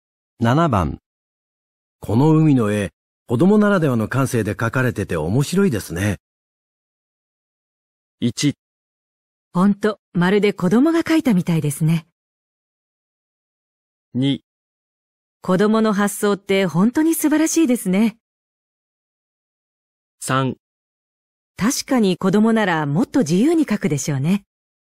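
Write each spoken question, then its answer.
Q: この海の絵、子供ならではの感性で描かれてて面白いですね。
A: 2: 子供の発想って本当に素晴らしいですね。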